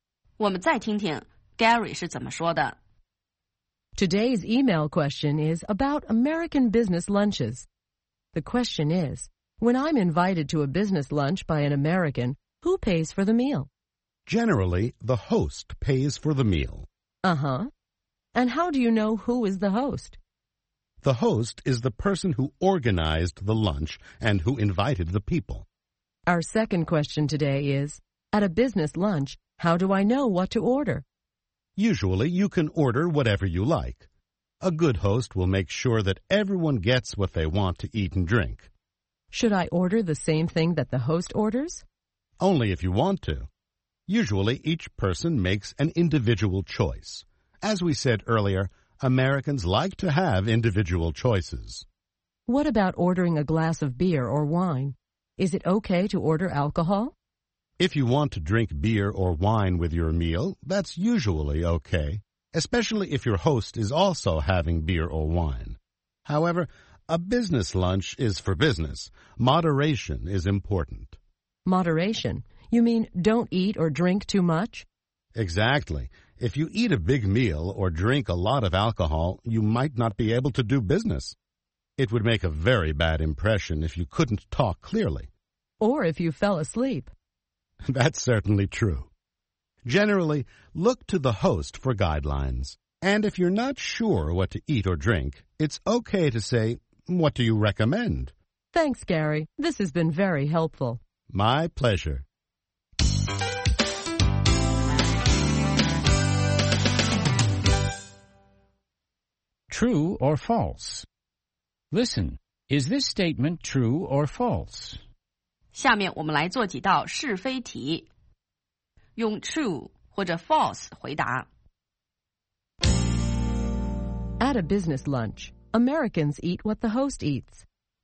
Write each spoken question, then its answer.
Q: At a business lunch, Americans eat what the host eats.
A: False. Americans eat whatever they want to eat.